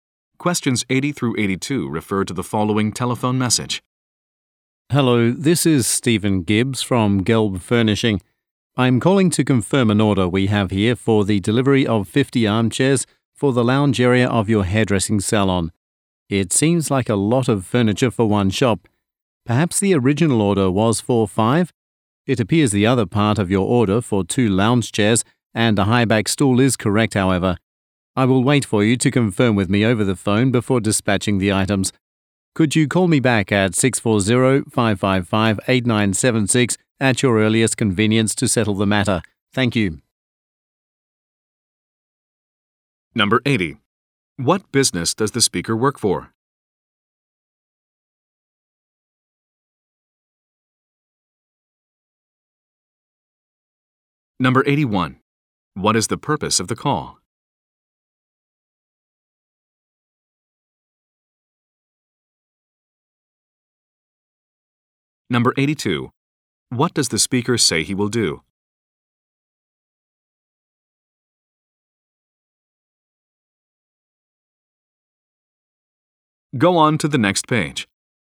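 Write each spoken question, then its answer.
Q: What business does the speaker work for?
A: A furniture company

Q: What is the purpose of the call?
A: To confirm an order

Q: What does the speaker say he will do?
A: Wait for confirmation before dispatching the items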